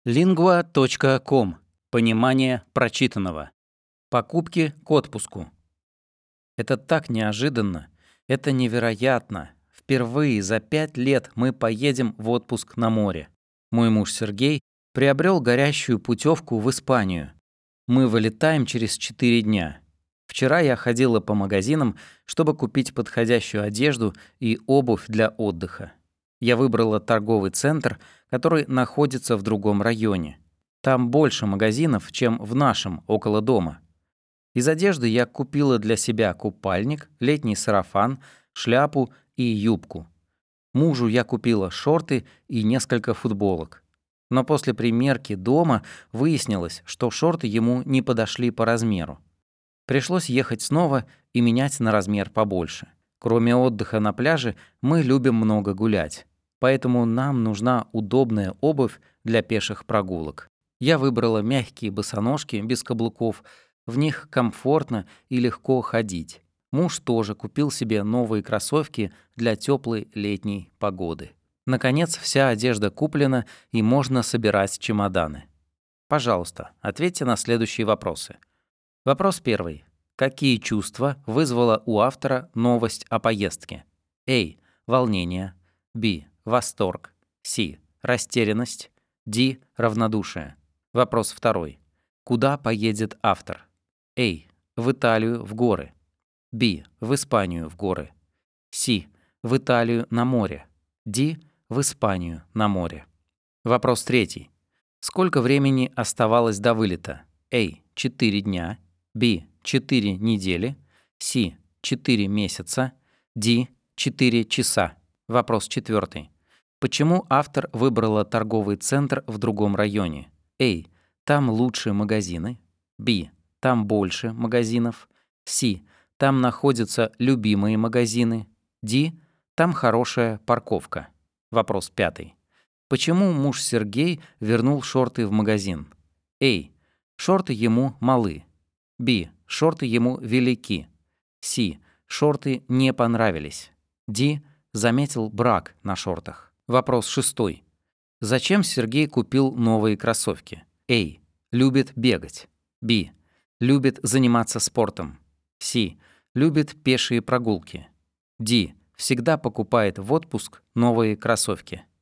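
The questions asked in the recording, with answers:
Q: Какие чувства вызвала у автора новость о поездке?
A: B: Восторг

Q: Куда поедет автор?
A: Д: В Испанию на море

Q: Сколько времени оставалось до вылета?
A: А: 4 дня

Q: Почему автор выбрала торговый центр в другом районе?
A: Б: Там больше магазинов

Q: Почему муж Сергей вернул шорты в магазин?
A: А: Шорты ему малы

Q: Зачем Сергей купил новые кроссовки?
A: С: Любит пешие прогулки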